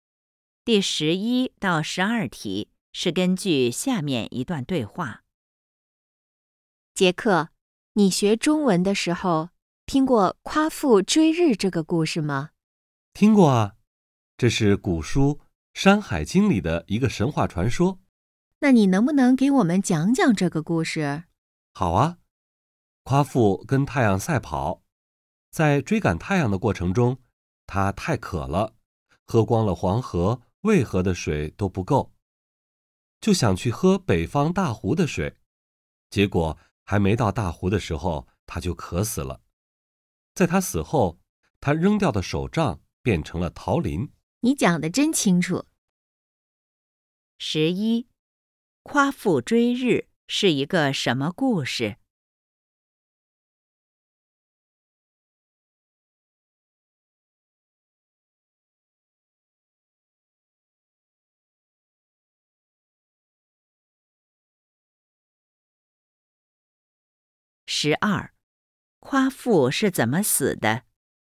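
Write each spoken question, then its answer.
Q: 夸父追日是一个什么故事?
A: 神话传说

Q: 夸父是怎么死的?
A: 渴死的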